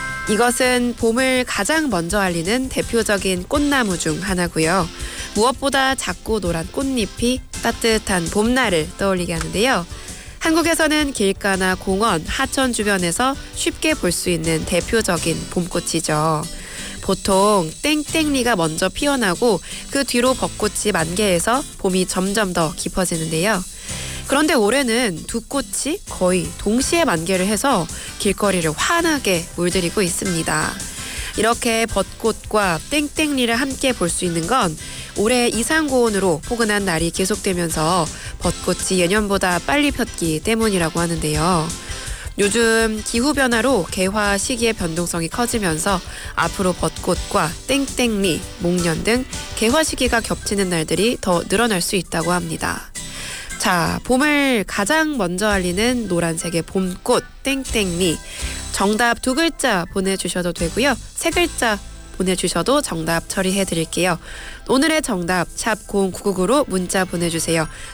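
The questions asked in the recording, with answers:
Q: 자, 봄을 가장 먼저 알리는 노란색의 봄꽃 땡땡리, 정답 두 글자 보내주셔도 되고요.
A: 개나리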